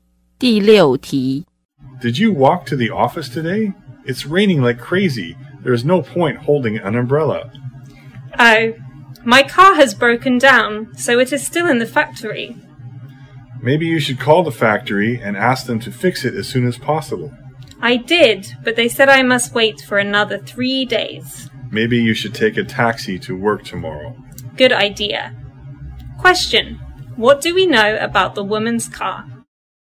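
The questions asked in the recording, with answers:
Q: what do we know about the woman's car?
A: It broke down and is being fixed at the factory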